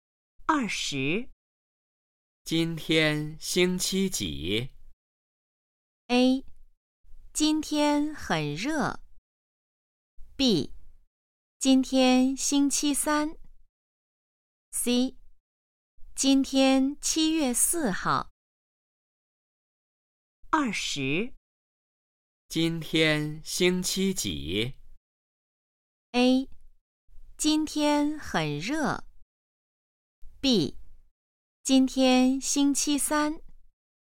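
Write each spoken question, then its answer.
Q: 今天星期几?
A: B: 今天星期三。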